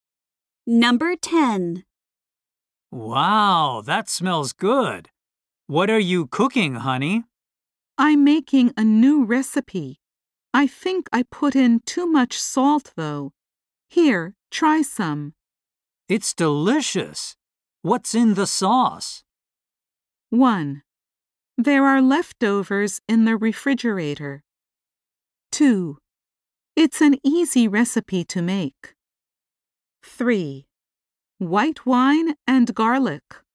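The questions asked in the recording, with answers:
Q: It's delicious. What's in the sauce?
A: 3: White wine and garlic.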